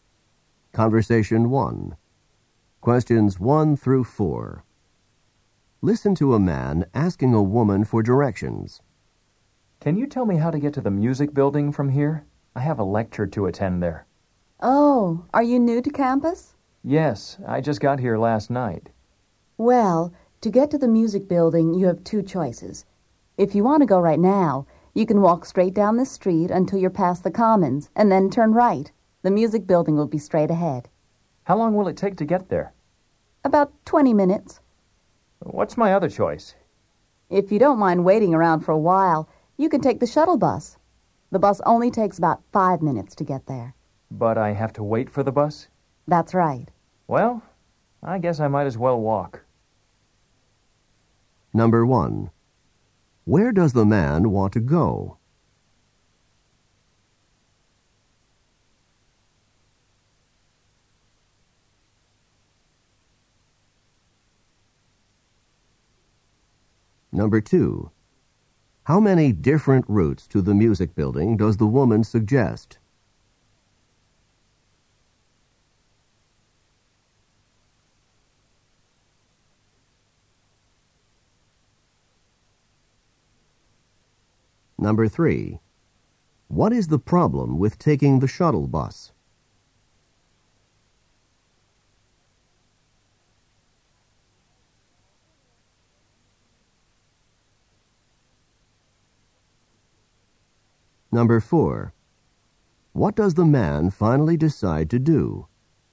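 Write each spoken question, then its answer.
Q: Where does the man want to go?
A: To the music building

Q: How many different routes to the music building does the woman suggest?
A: Two

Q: What is the problem with taking the shuttle bus?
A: He has to wait for the bus

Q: What does the man finally decide to do?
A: Walk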